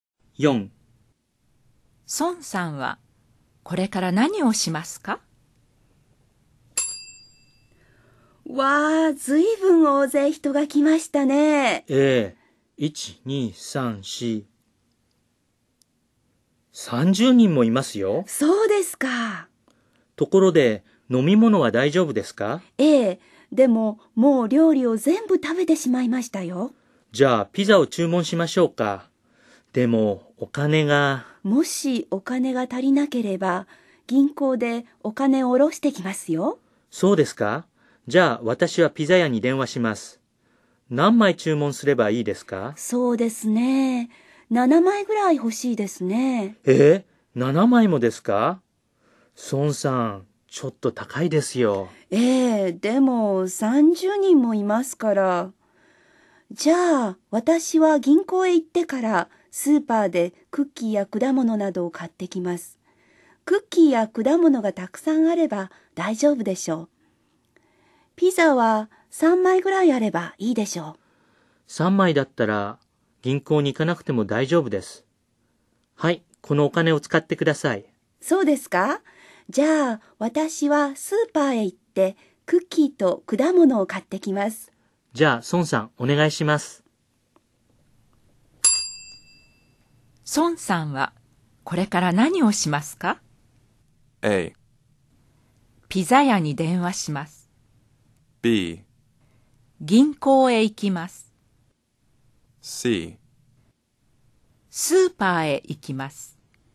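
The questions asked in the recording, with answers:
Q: 孫さんはこれから何をしますか?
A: C: スーパーへ行きます。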